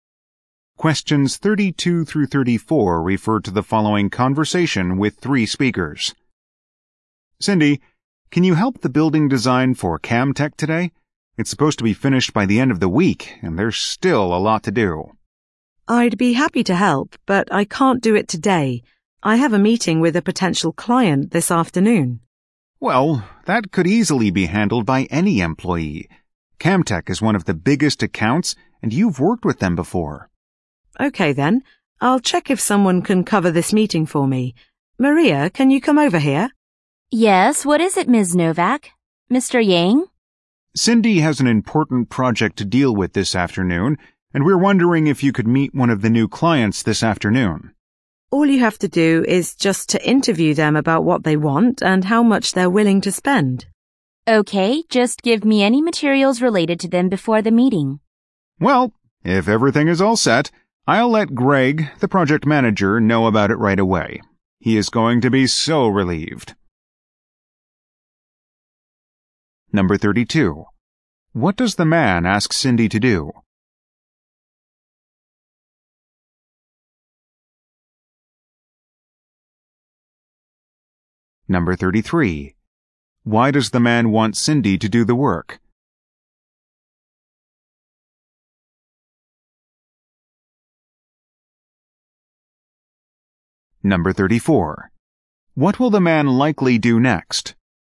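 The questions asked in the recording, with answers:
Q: What does the man ask Cindy to do?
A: Help with the building design for Camtech

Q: Why does the man want Cindy to do the work?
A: She has worked with Camtech before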